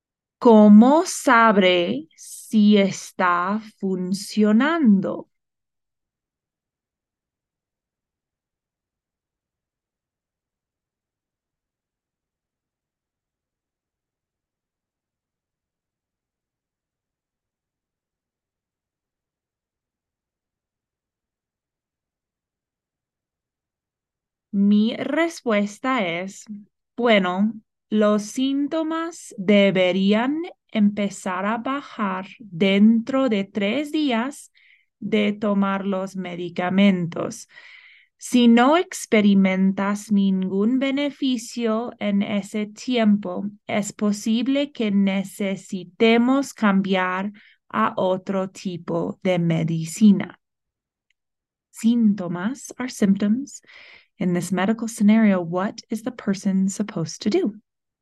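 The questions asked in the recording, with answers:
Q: In this medical scenario, what is the person supposed to do?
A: Take the medication and wait three days for the symptoms to go down; if there is no improvement, switch medicine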